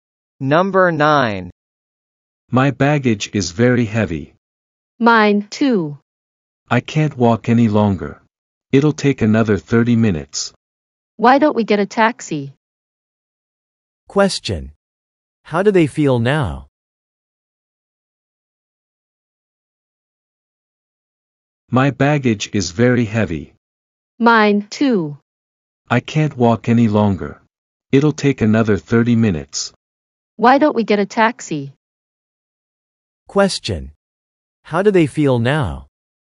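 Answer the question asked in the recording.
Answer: Tired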